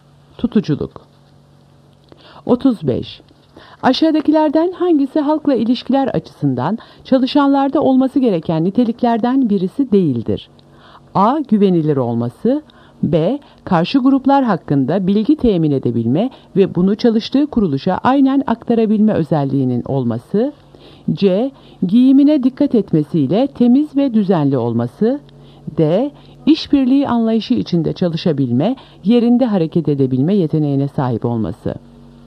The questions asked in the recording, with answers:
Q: Aşağıdakilerden hangisi halkla ilişkiler açısından çalışanlarda olması gereken niteliklerden birisi değildir?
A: Doğru cevap B. Karşı gruplar hakkında bilgi temin edebilme ve bunu çalıştığı kuruluşa aynen aktarabilme özelliğinin olması.